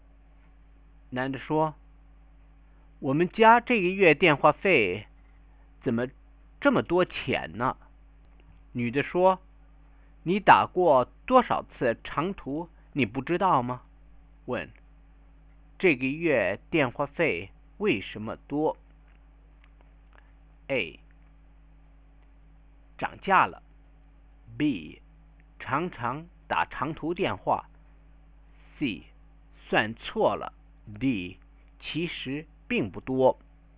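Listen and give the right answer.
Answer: B: 常常打长途电话。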